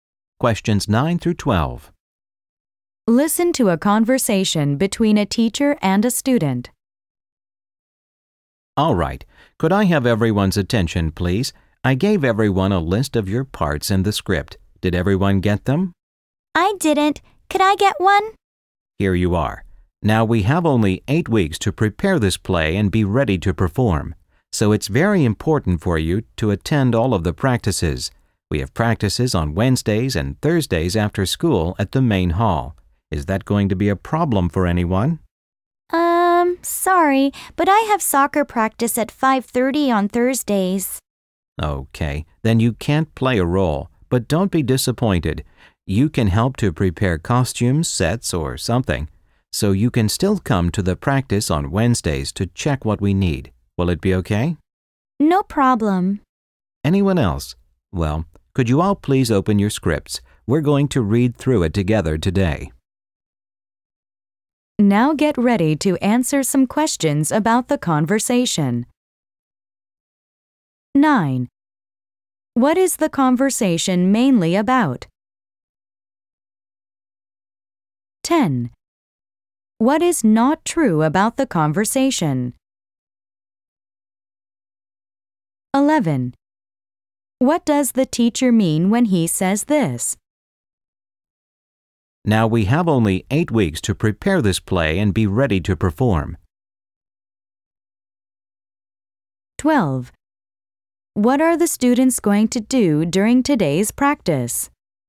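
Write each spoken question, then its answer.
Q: What is the conversation mainly about?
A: Preparing a school play and its practice schedule

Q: What does the teacher mean when he says this?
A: Time is short, so students must attend all practices

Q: What are the students going to do during today's practice?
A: Read through the script together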